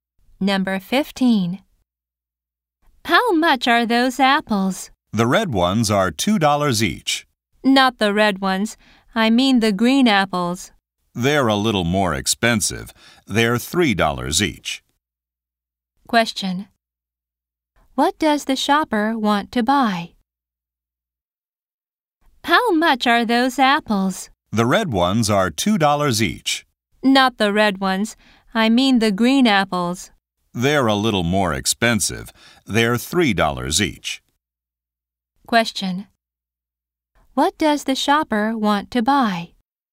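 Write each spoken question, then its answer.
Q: What does the shopper want to buy?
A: Green apples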